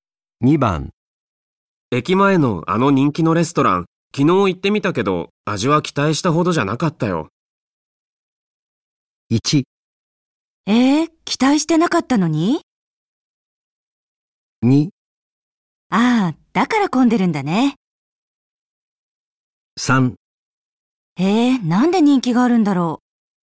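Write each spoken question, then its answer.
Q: 駅前のあの人気のレストラン昨日行ってみたけど味は期待したほどじゃなかったよ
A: 3: えー、なんで人気があるんだろう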